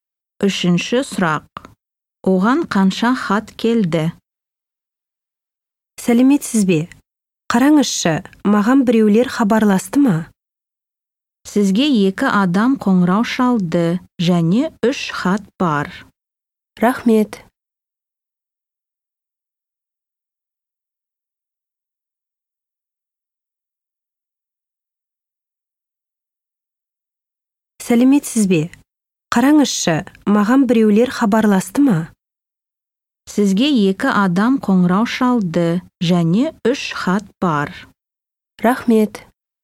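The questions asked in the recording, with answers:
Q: Оған қанша хат келді?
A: үш хат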